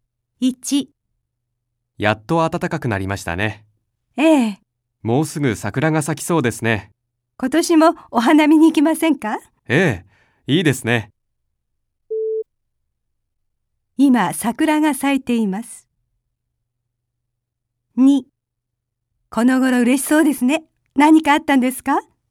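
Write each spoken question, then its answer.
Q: 今桜が咲いています。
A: ×(まだ咲いていない)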